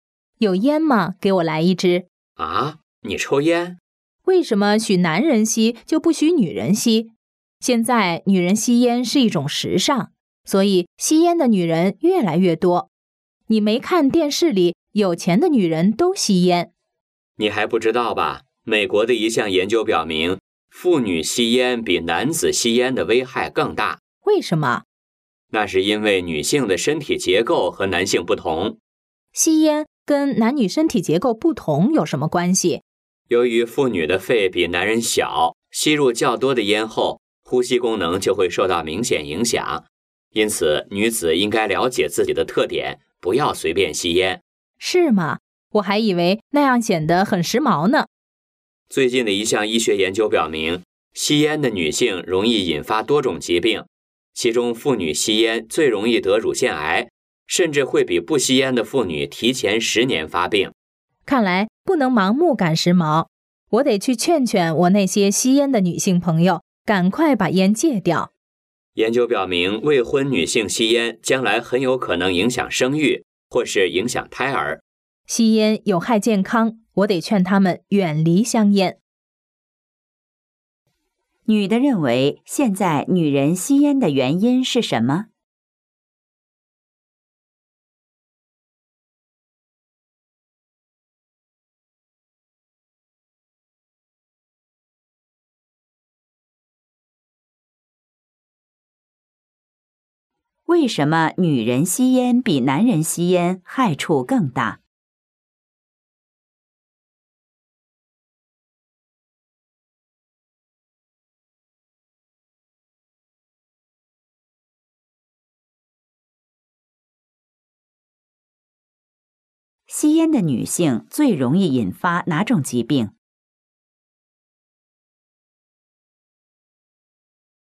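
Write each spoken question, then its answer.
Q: 女的认为现在女人吸烟的原因是什么?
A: 现在女人吸烟是一种时尚

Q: 为什么女人吸烟比男人吸烟害处更大?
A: 因为女性的身体结构和男性不同,妇女的肺比男人小

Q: 吸烟的女性最容易引发哪种疾病?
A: 乳腺癌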